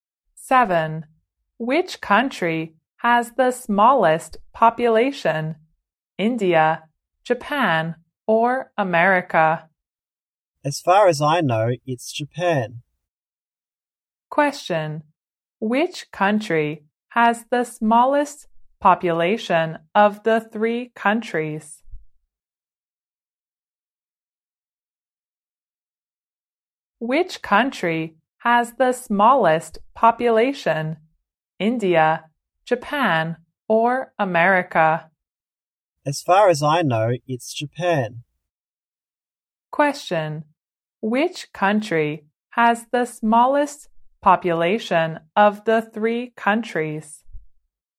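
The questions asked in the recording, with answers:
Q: Which country has the smallest population of the three countries?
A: Japan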